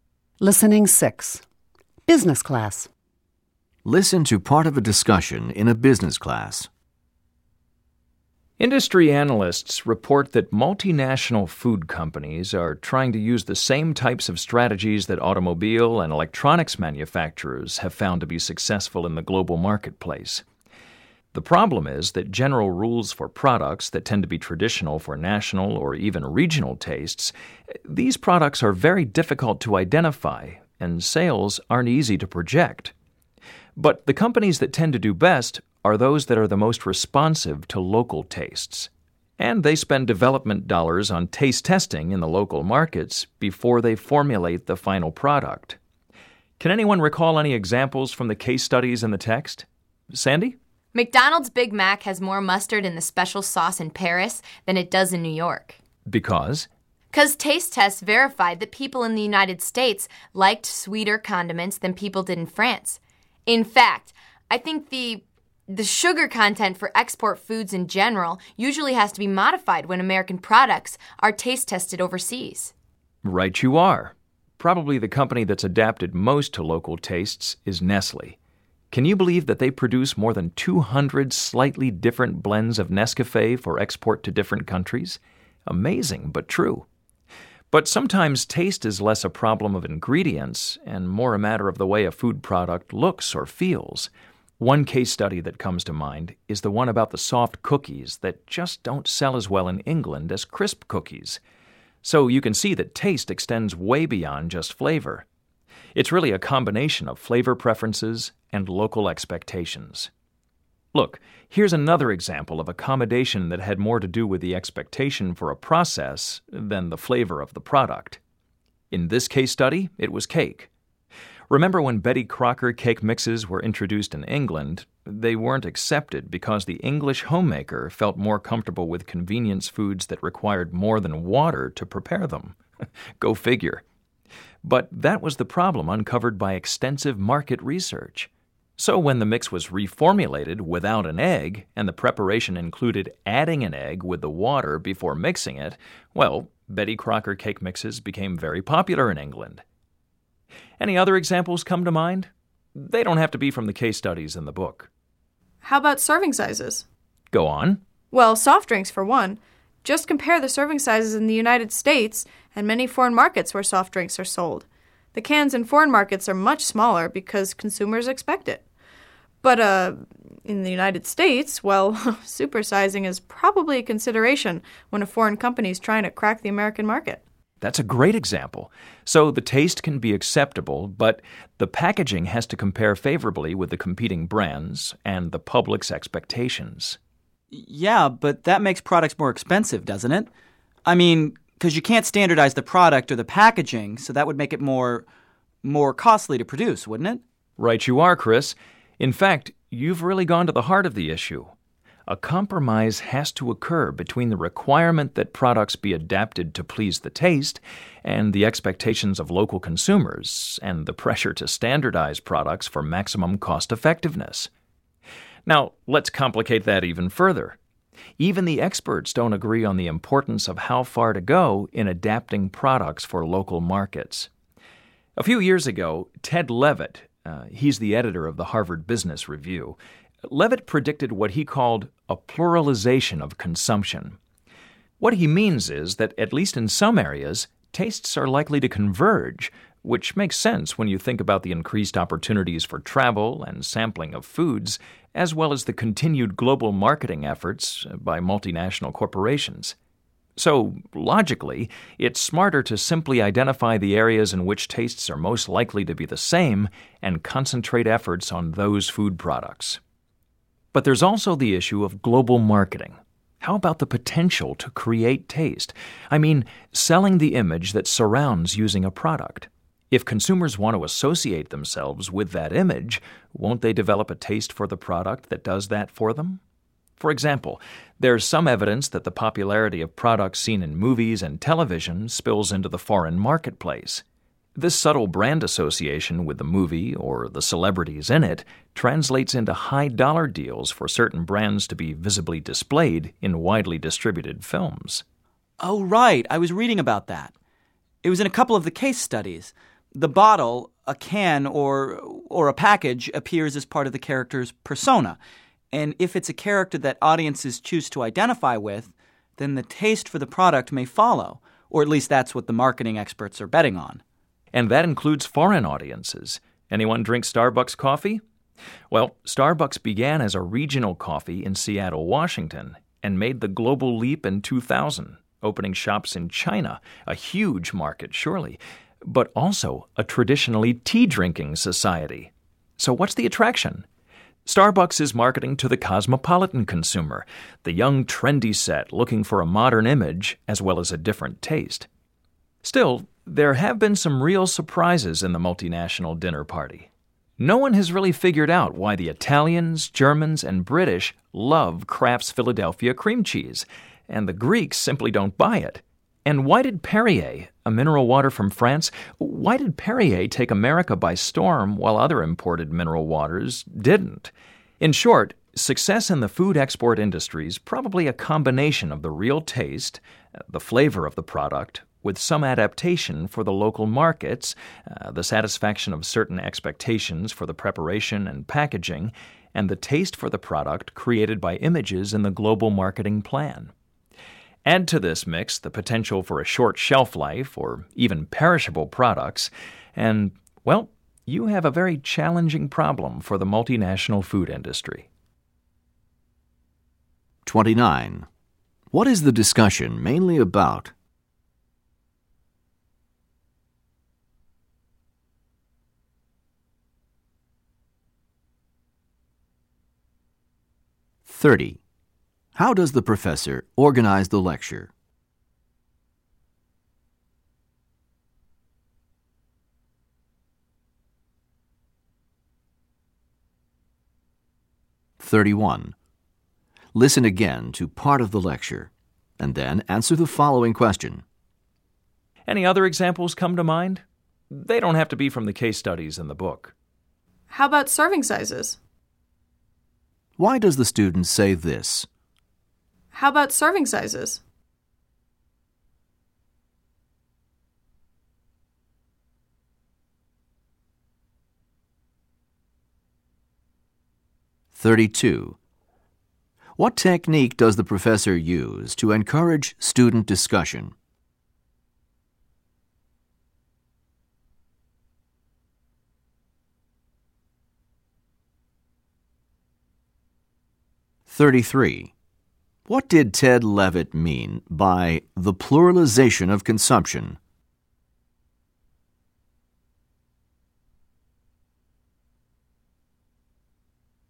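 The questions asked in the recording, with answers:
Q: What is the discussion mainly about?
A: How multinational food companies adapt products to local tastes and expectations in global markets

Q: What did Ted Levitt mean by the pluralization of consumption?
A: Tastes are likely to converge in some areas.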